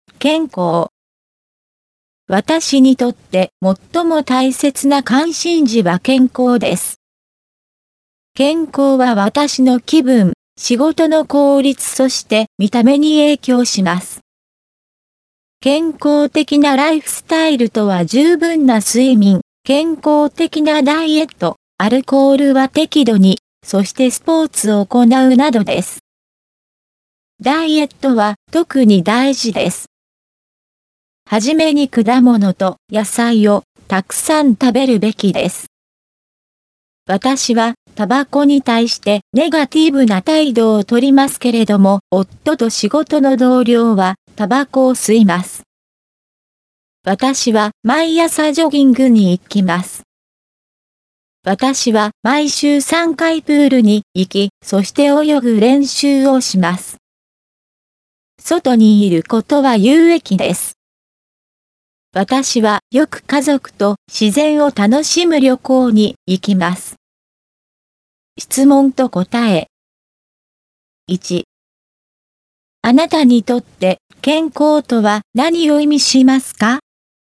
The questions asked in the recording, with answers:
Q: あなたにとって健康とは何を意味しますか?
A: 健康は私にとって気分、見た目と仕事の効率を意味します。